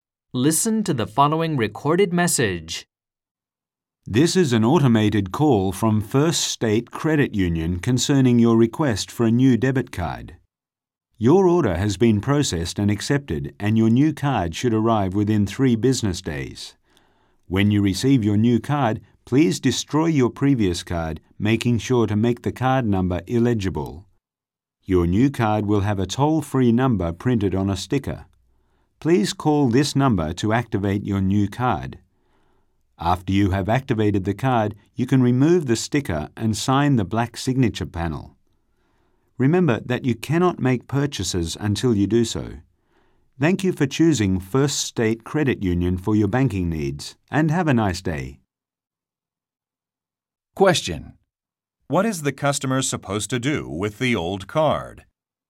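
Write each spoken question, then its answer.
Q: What is the customer supposed to do with the old card?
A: Destroy it, making the card number illegible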